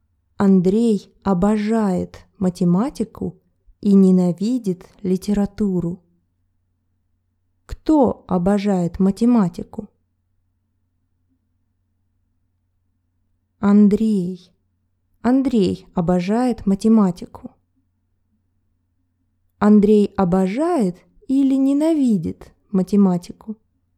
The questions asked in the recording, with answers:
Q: Андрей обожает или ненавидит математику?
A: Обожает. Он очень любит математику.